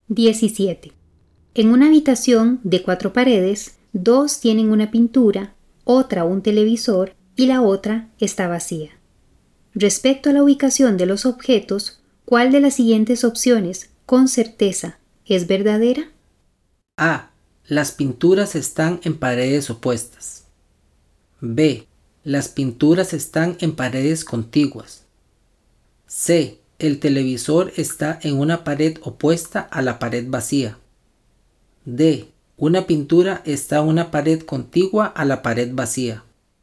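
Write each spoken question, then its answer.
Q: Respecto a la ubicación de los objetos, ¿cuál de las siguientes opciones, con certeza, es verdadera?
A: D: Una pintura está en una pared contigua a la pared vacía.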